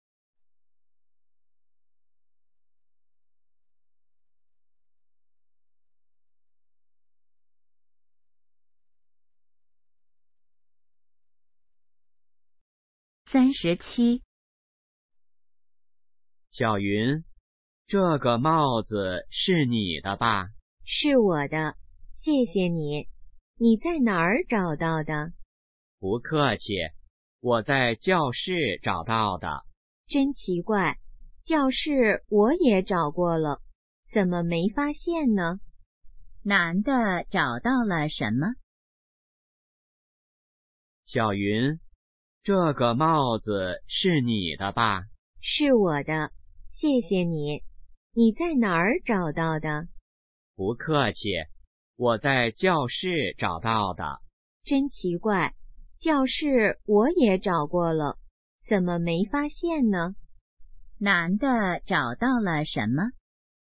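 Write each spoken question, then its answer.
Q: 男的找到了什么?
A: 帽子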